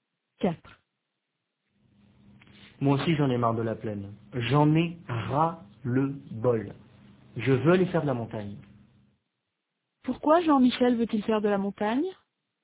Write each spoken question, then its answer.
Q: Pourquoi Jean-Michel veut-il faire de la montagne?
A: Parce qu'il en a marre de la plaine.